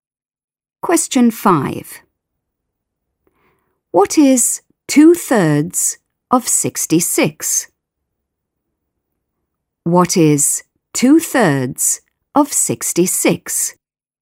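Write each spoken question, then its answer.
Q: What is 2/3 of 66?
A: 44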